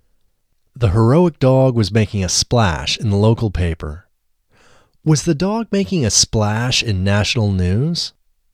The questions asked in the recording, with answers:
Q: Was the dog making a splash in national news?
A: No, the dog wasn't making a splash in national news.